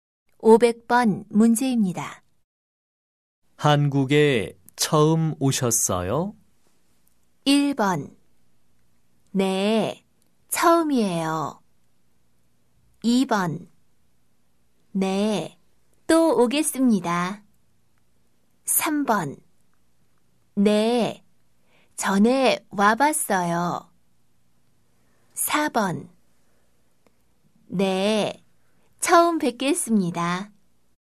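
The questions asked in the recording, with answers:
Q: 한국에 처음 오셨어요?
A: 1: 네, 처음이에요.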